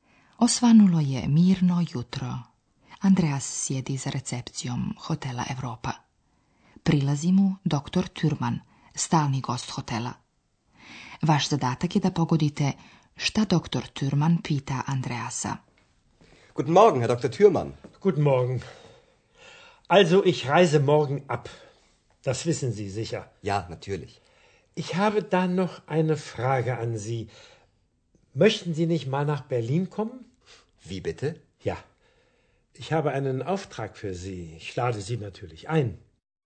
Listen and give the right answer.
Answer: Dr. Thürmann odlazi i pita Andreasa ne bi li on želio doći u Berlin.